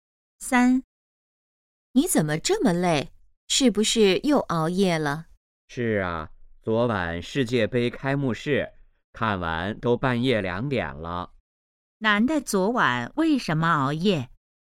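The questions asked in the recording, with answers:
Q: 男的昨晚为什么熬夜?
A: 看世界杯开幕式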